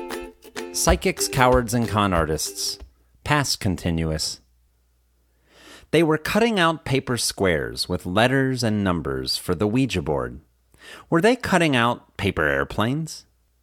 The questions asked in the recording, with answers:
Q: Were they cutting out paper airplanes?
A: No, they weren't cutting out paper airplanes.